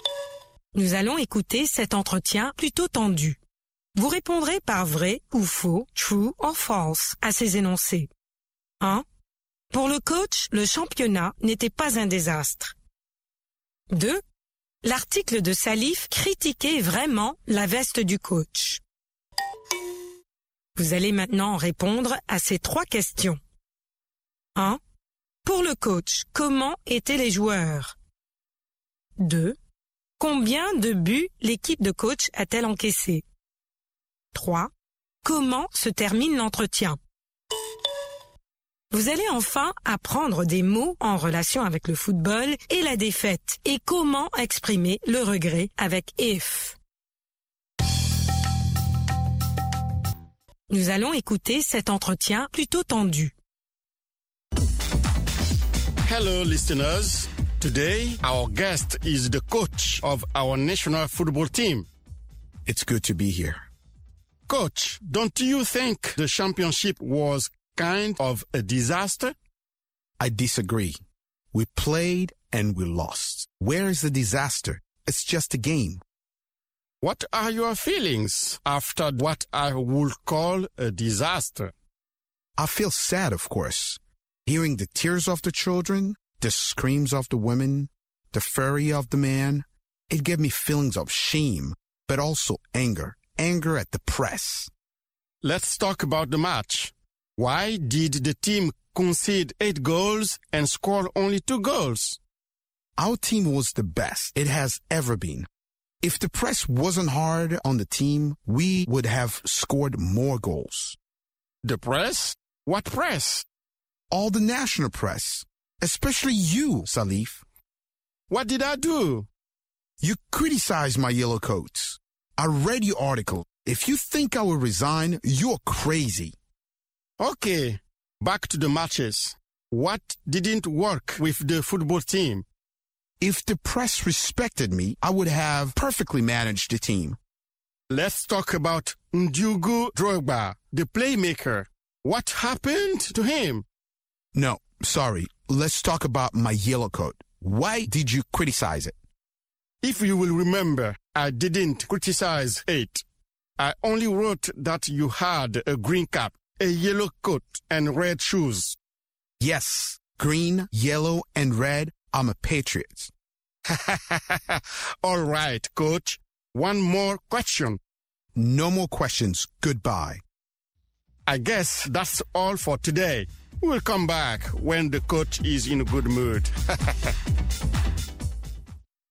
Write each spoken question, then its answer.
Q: Pour le coach, le championnat n'était pas un désastre.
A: L'énoncé 1 est vrai.

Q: L'article de Salif critiquait vraiment la veste du coach.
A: L'énoncé 2 est faux.

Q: Pour le coach, comment étaient les joueurs?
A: Ils étaient les meilleurs.

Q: Combien de buts l'équipe de coach a-t-elle encaissé?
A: 8 buts.

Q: Comment se termine l'entretien?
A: Le coach l'arrête.